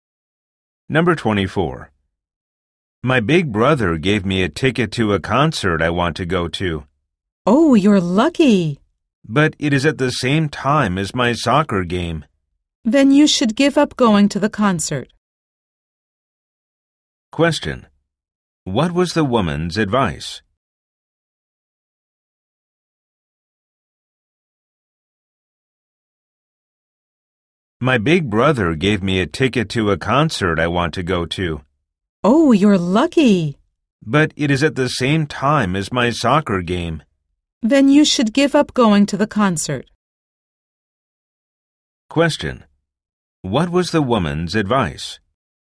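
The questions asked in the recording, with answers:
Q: What was the woman's advice?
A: To give up going to the concert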